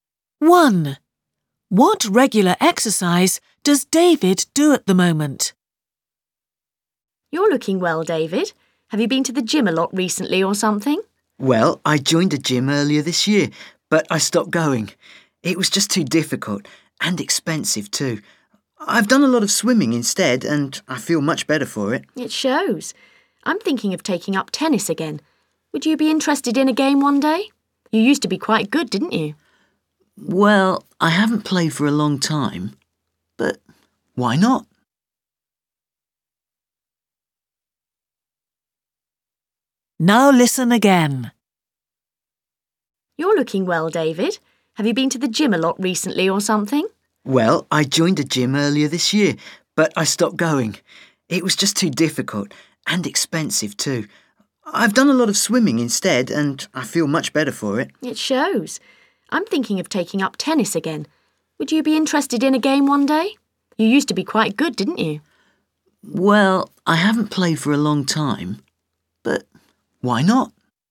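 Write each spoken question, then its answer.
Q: What regular exercise does David do at the moment?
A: Swimming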